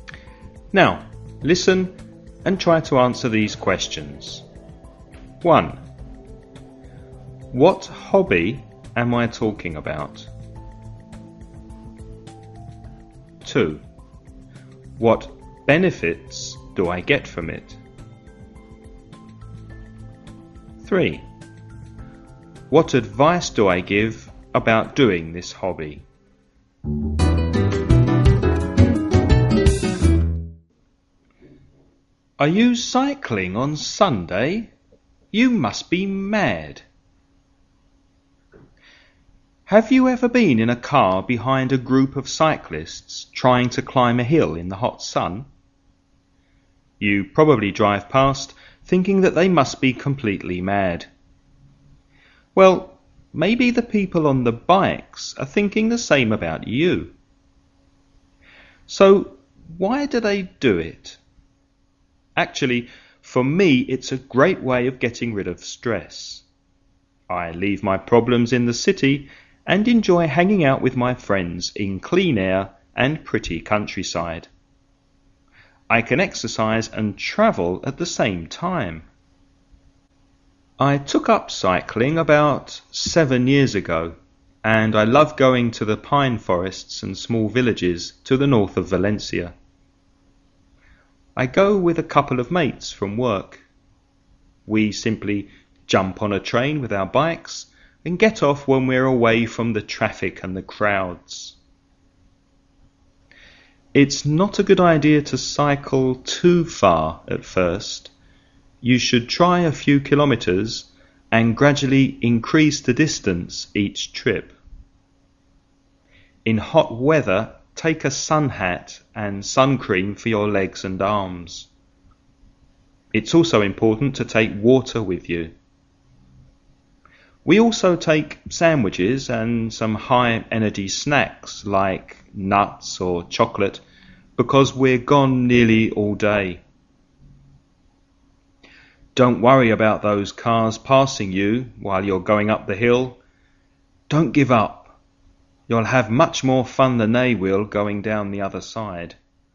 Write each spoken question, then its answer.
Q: What hobby am I talking about?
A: Cycling.

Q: What benefits do I get from it?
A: I can get rid of stress. I can hang out with my mates.

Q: What advice do I give about doing this hobby?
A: You shouldn't cycle too far in the beginning.